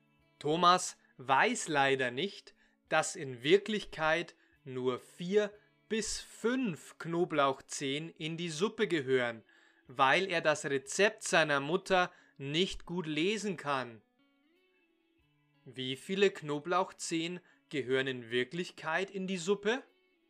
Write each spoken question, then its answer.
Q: Wie viele Knoblauchzehen gehören in Wirklichkeit in die Suppe?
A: Vier bis fünf.